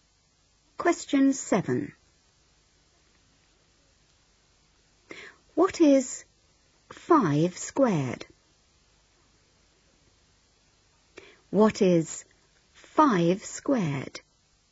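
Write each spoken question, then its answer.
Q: What is 5 squared?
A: 25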